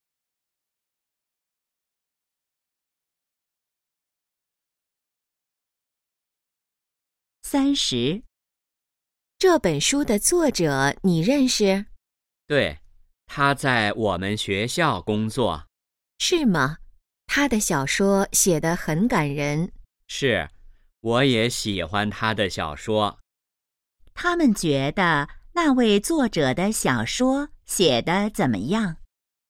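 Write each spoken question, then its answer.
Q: 他们觉得那位作者的小说写得怎么样?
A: 很感人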